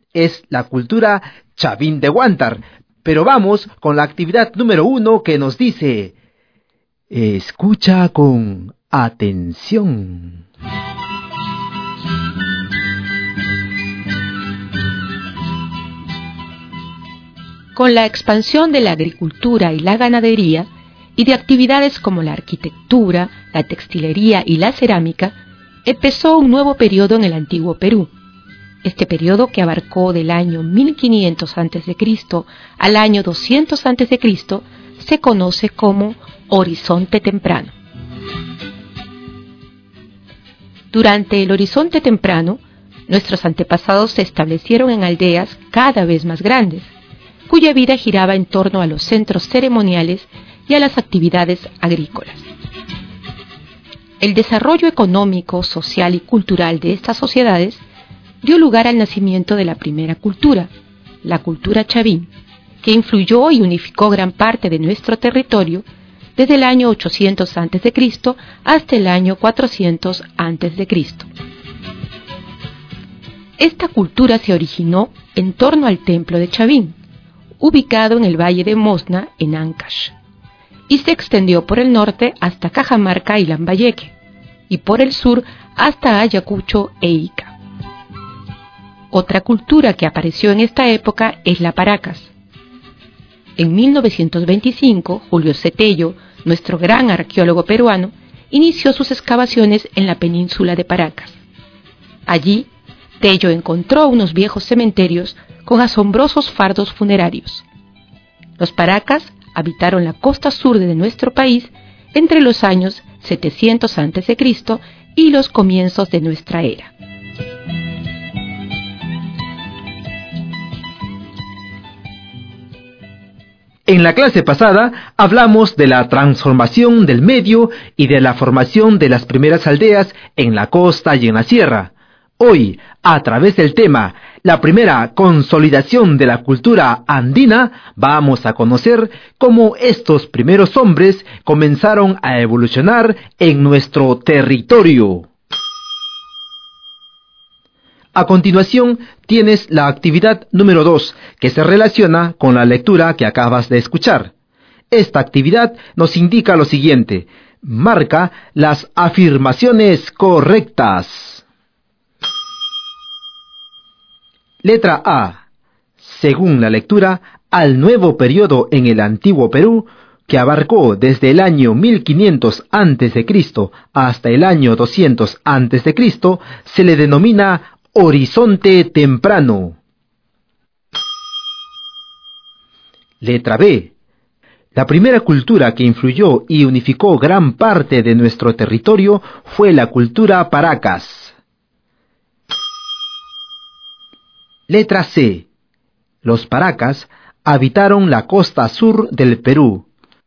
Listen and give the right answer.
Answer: en esta actividad solo hay una afirmación incorrecta, y es la letra B.